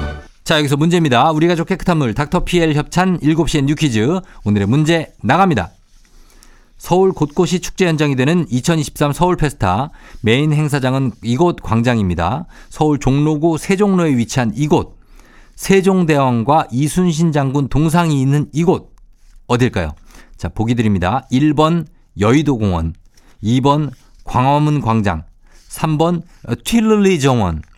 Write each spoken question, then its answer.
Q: 서울 종로구 세종로에 위치한 이곳 세종대왕과 이순신 장군 동상이 있는 이곳 어딜까요?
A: 자, 정답은 2번 광화문 광장이죠.